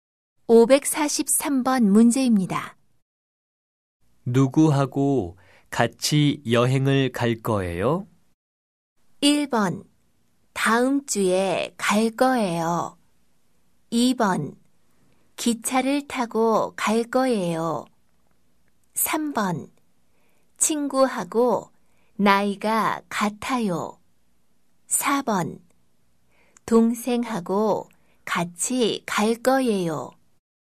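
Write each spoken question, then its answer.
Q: 누구하고 같이 여행을 갈 거예요?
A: 4: 동생하고 같이 갈 거예요.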